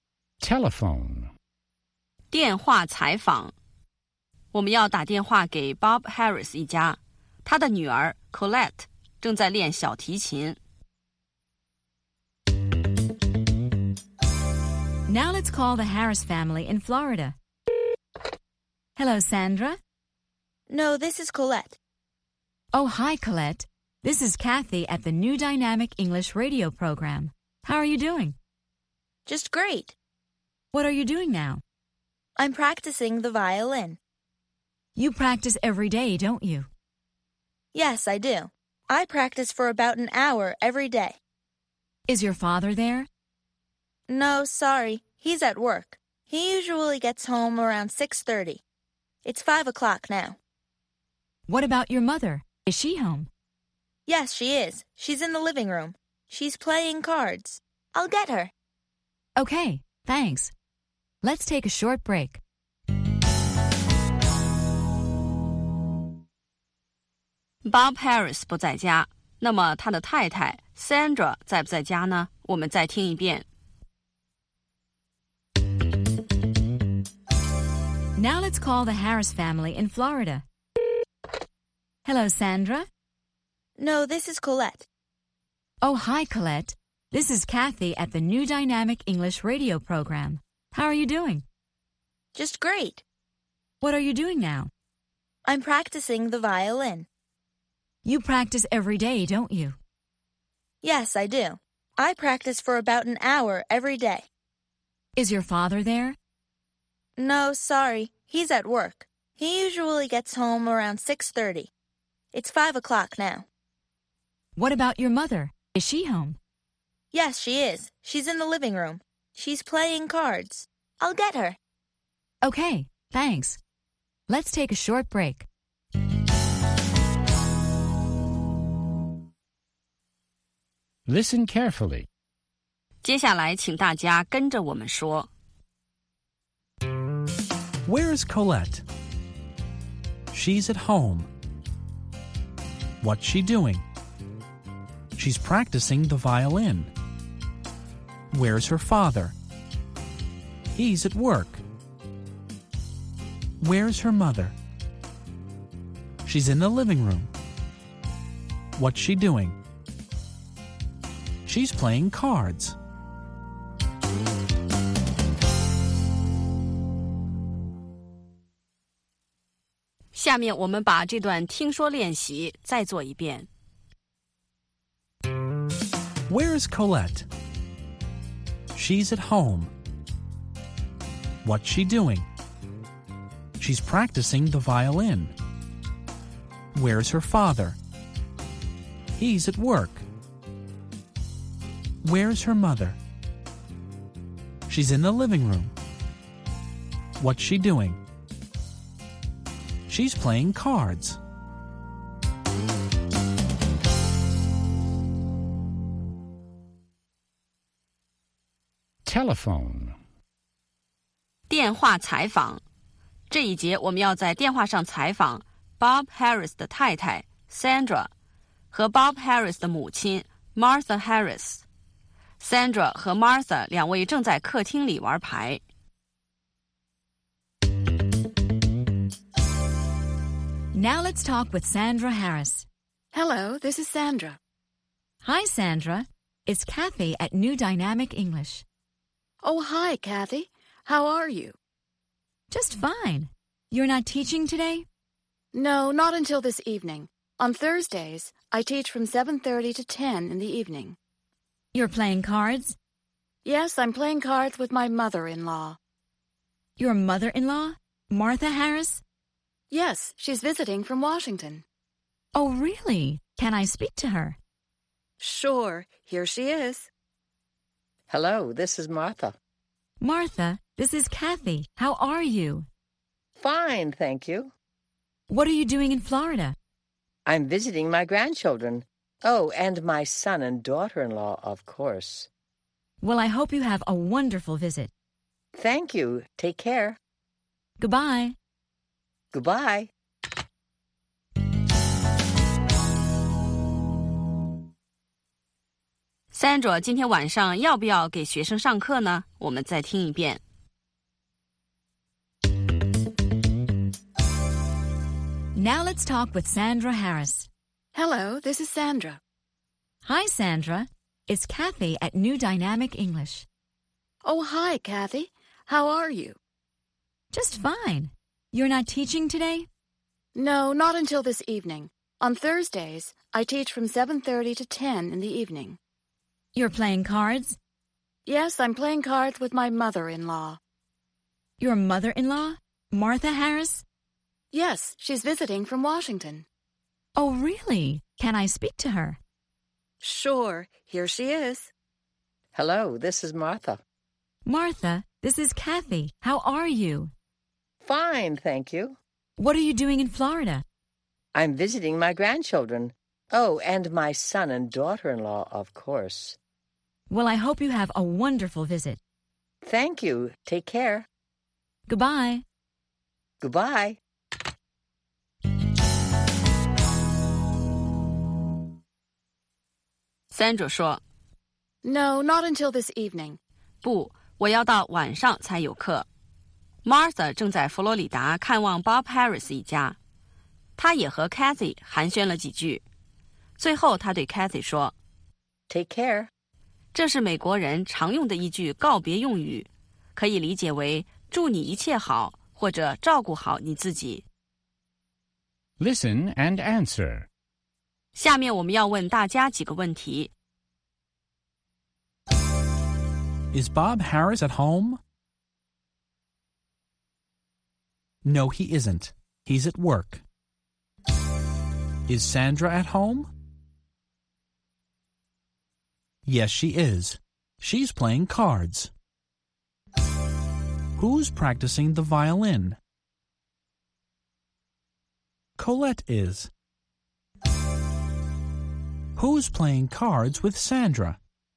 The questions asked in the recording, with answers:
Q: Is Bob Harris at home?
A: No, he isn't. He's at work.

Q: Is Sandra at home?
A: Yes, she is. She's playing cards.

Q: Who's practicing the violin?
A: Colette is.

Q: Who's playing cards with Sandra?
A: Martha is. They're playing cards in the living room.